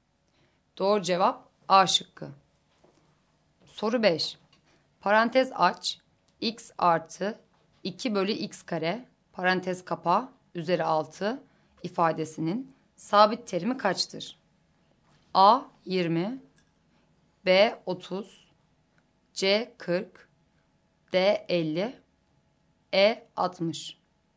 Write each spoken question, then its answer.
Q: Parantez aç, x artı 2 bölü x kare parantez kapa üzeri 6 ifadesinin sabit terimi kaçtır?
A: Doğru cevap E şıkkı.